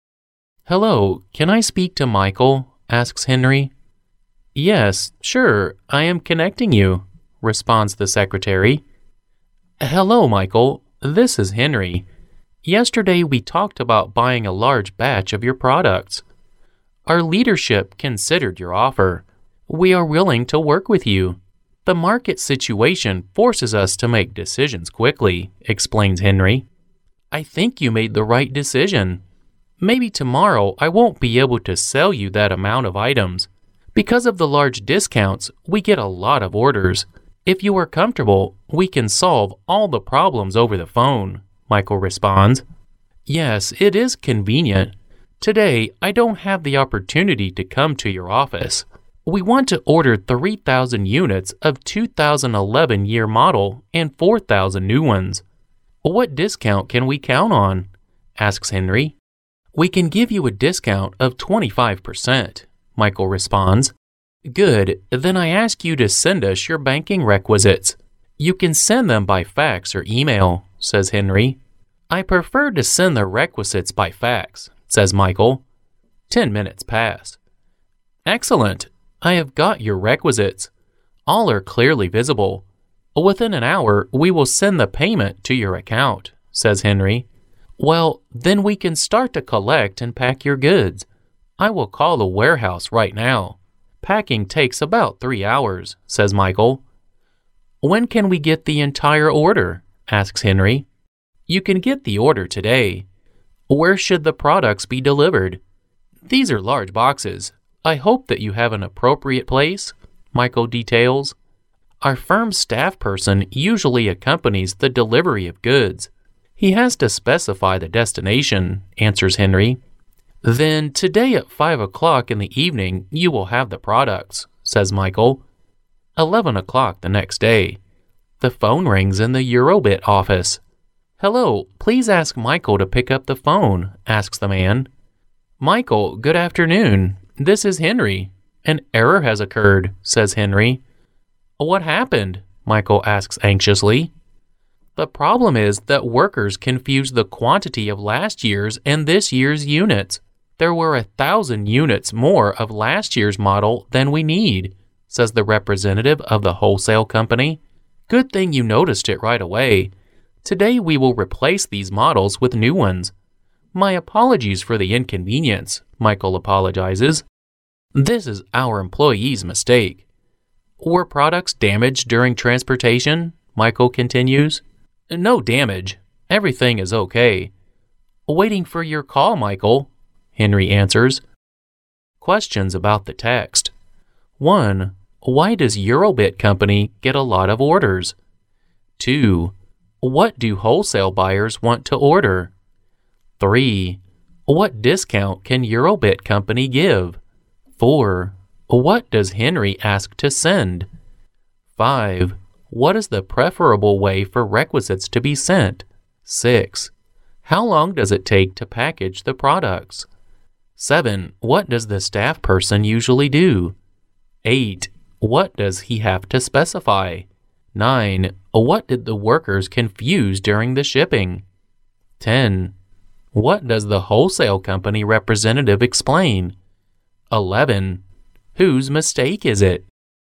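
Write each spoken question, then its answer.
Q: Why does Eurobit Company get a lot of orders?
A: Because of the large discounts

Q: What do wholesale buyers want to order?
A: 3,000 units of the 2011 model and 4,000 new ones

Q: What discount can Eurobit Company give?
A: 25%

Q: What does Henry ask to send?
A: Their banking requisites

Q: What is the preferable way for requisites to be sent?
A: By fax

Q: How long does it take to package the products?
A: About 3 hours

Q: What does the staff person usually do?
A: Accompanies the delivery of goods

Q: What does he have to specify?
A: The destination

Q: What did the workers confuse during the shipping?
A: The quantity of last year's and this year's units

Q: What does the wholesale company representative explain?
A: There were 1,000 more units of last year's model than they needed

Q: Whose mistake is it?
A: Their (Eurobit's) employee's mistake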